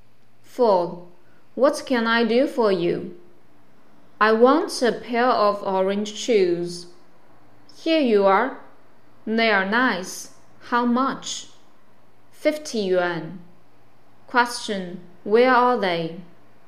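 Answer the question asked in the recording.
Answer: In a shoe shop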